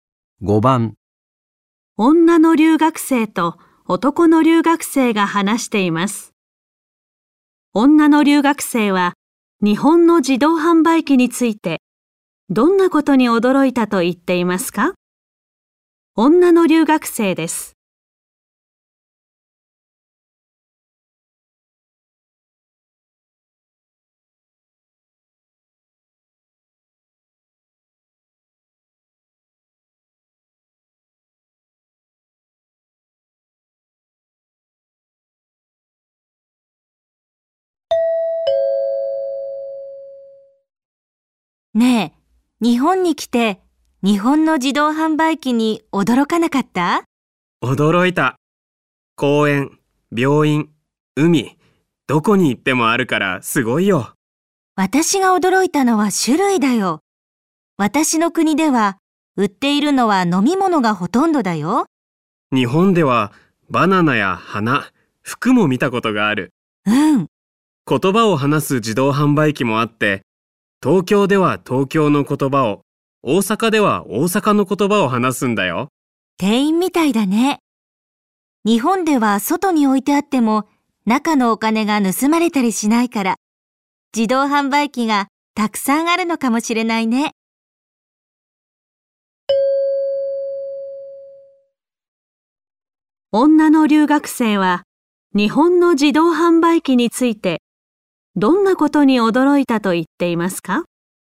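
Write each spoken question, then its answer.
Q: 女の留学生は日本の自動販売機についてどんなことに驚いたと言っていますか?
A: 売っている物の種類が多いこと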